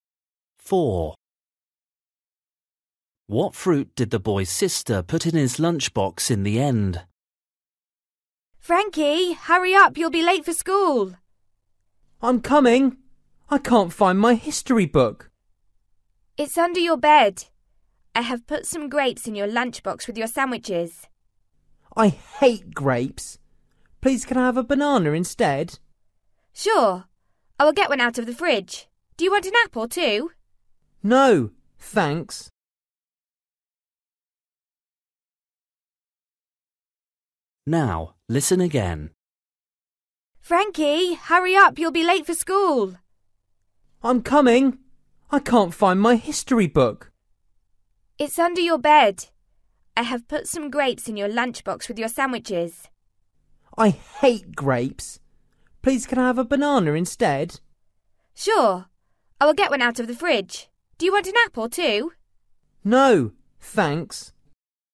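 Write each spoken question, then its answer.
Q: What fruit did the boy's sister put in his lunchbox in the end?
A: A banana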